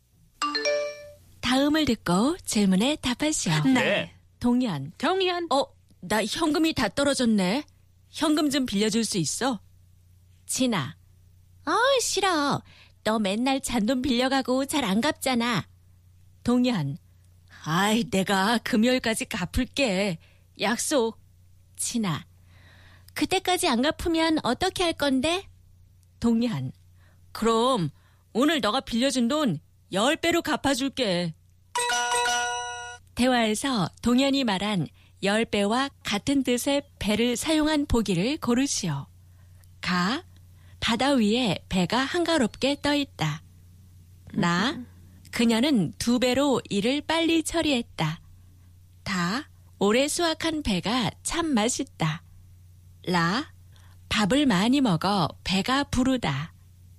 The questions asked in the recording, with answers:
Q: 대화에서 동현이 말한 10배와 같은 뜻의 배를 사용한 보기를 고르시오.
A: 나 그녀는 두 배로 일을 빨리 처리했다.